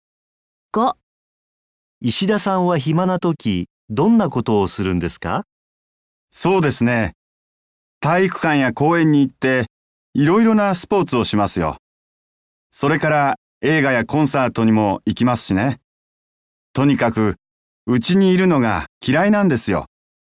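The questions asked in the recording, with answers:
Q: 石田さんは暇な時どんなことをするんですか?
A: いろいろなスポーツをしたり、映画やコンサートに行ったりします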